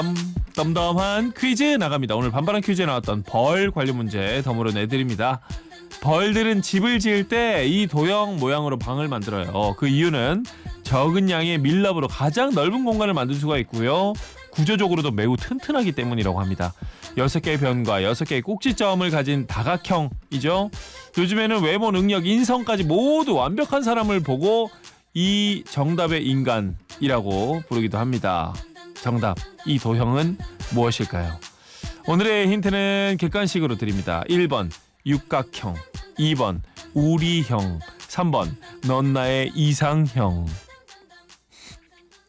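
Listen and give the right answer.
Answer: 1번: 육각형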